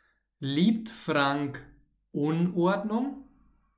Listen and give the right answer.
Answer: Nein, nicht Unordnung. Das Gegenteil, Ordnung.